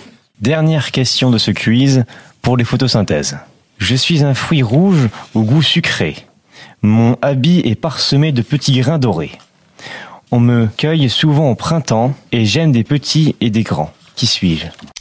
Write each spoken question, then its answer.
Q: Je suis un fruit rouge au goût sucré. Mon habit est parsemé de petits grains dorés. On me cueille souvent au printemps et j'aime des petits et des grands. Qui suis-je ?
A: La fraise.